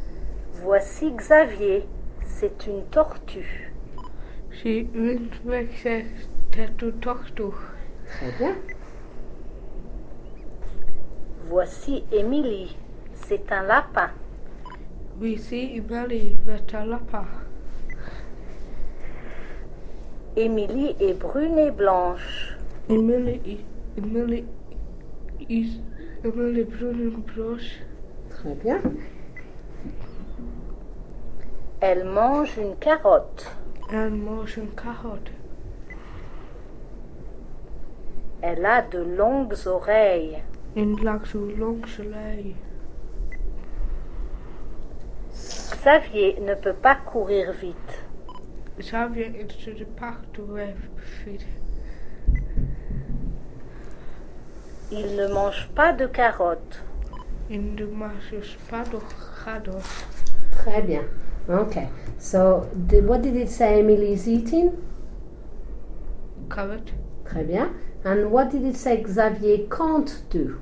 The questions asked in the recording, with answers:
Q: Okay, so what did it say Emily is eating?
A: Carrot.